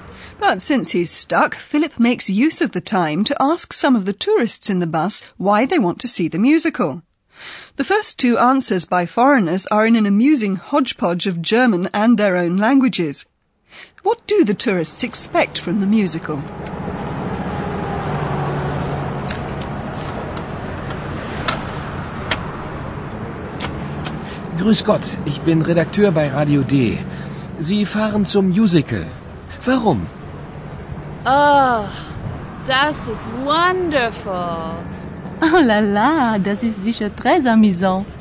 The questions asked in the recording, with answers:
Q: What do the tourists expect from the musical?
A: The tourists are looking forward to the performance.